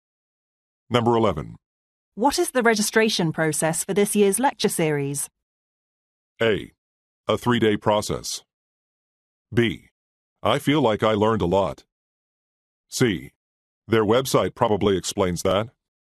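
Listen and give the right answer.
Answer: C: Their website probably explains that.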